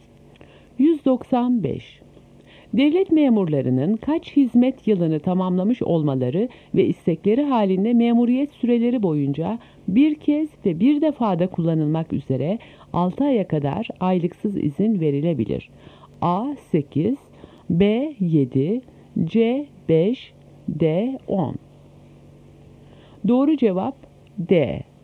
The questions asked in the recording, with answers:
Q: Devlet memurlarının kaç hizmet yılını tamamlamış olmaları ve istekleri halinde memuriyet süreleri boyunca bir kez ve bir defada kullanılmak üzere 6 aya kadar aylıksız izin verilebilir.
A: Doğru cevap D.